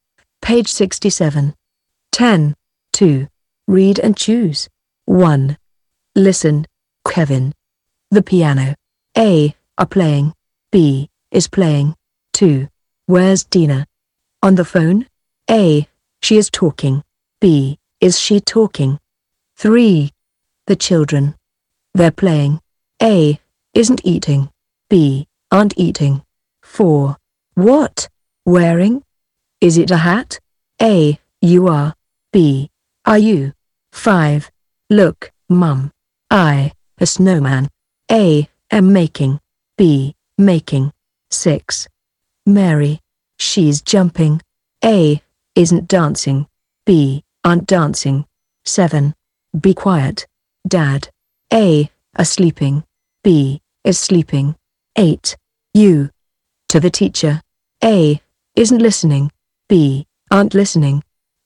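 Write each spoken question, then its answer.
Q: Listen, Kevin. The piano. A. Are playing. B. Is playing.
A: B: Is playing

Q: The children. They're playing. A. Isn't eating. B. Aren't eating.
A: B: Aren't eating

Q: What? Wearing? Is it a hat? A. You are. B. Are you?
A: B: Are you

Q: Look, Mum. I. A snowman. A. Am making. B. Making.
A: A: Am making

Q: Mary. She's jumping. A. Isn't dancing. B. Aren't dancing.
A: A: Isn't dancing

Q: Be quiet. Dad. A. Are sleeping. B. Is sleeping.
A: B: Is sleeping

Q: You. To the teacher. A. Isn't listening. B. Aren't listening.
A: B: Aren't listening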